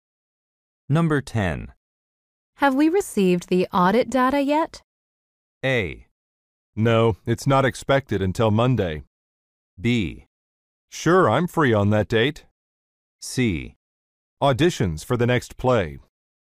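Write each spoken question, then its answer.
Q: Have we received the audit data yet?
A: A: No, it's not expected until Monday.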